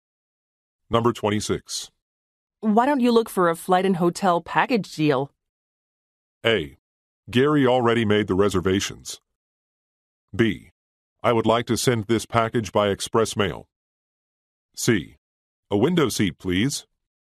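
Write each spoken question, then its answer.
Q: Why don't you look for a flight and hotel package deal?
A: A: Gary already made the reservations.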